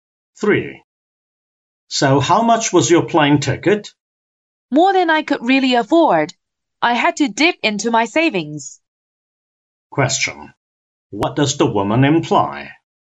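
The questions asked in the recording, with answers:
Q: What does the woman imply?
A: The ticket cost so much that she had to use her savings.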